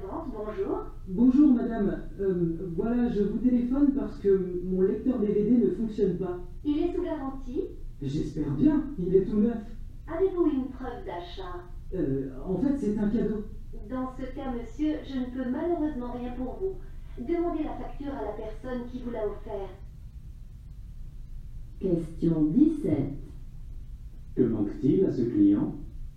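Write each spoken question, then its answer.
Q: Que manque-t-il à ce client?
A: Une preuve d'achat (la facture)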